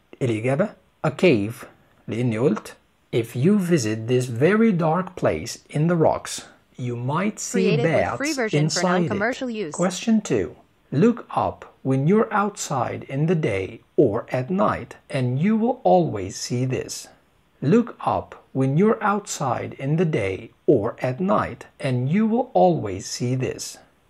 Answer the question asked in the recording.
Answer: الإجابة the sky.